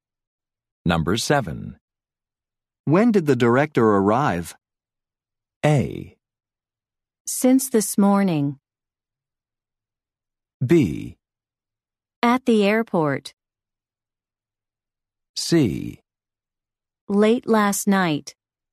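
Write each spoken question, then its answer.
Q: When did the director arrive?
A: C: Late last night.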